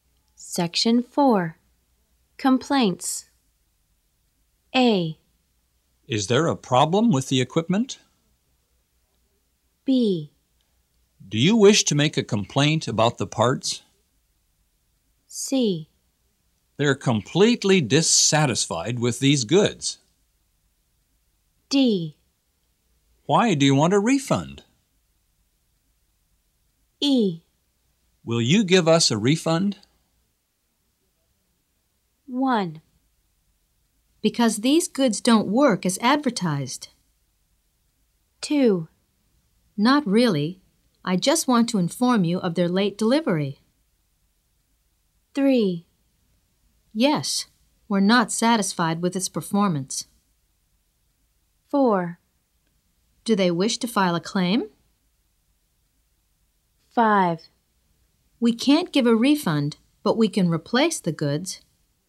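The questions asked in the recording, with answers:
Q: Because these goods don't work as advertised.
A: D: Why do you want a refund?

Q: Not really. I just want to inform you of their late delivery.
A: B: Do you wish to make a complaint about the parts?

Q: Yes, we're not satisfied with its performance.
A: A: Is there a problem with the equipment?

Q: Do they wish to file a claim?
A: C: They're completely dissatisfied with these goods.

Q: We can't give a refund, but we can replace the goods.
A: E: Will you give us a refund?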